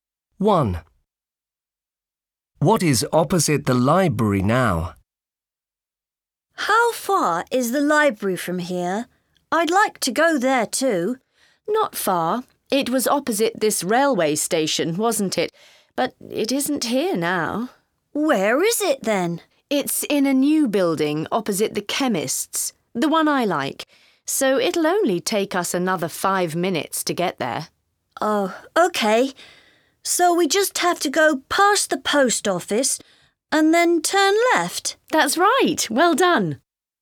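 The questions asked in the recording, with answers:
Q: What is opposite the library now?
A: the chemist's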